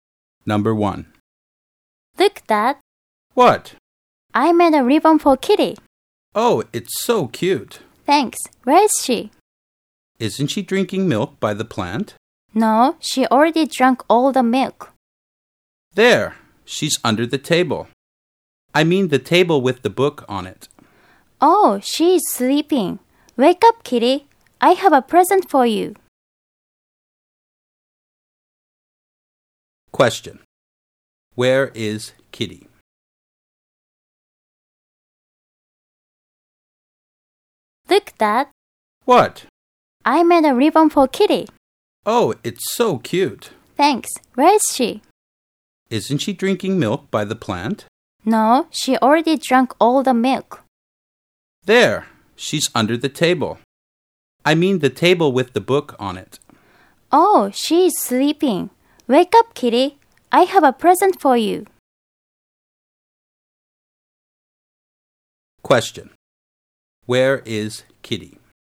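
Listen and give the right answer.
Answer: Under the table with the book on it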